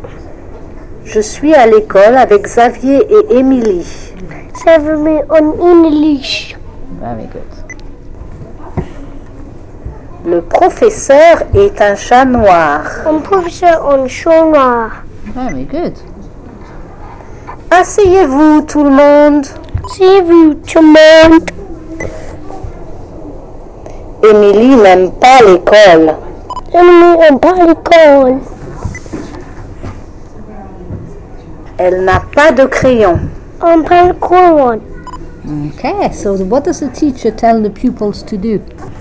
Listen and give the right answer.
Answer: He said, asseyez-vous tout le monde.